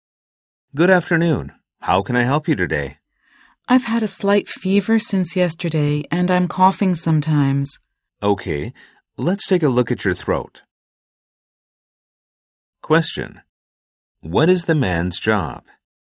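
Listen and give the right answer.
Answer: A doctor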